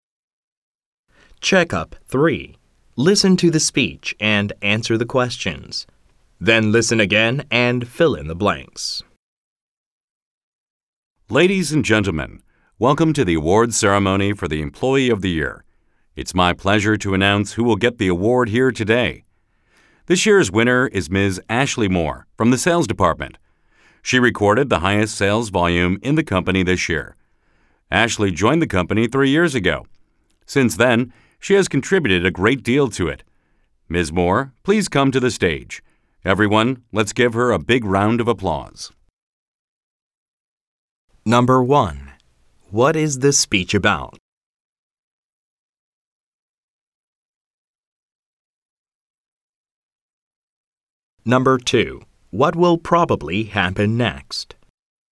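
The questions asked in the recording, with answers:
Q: What is this speech about?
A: Announcing the Employee of the Year award winner, Ashley Moore

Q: What will probably happen next?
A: Ms. Moore will come to the stage to receive the award while everyone applauds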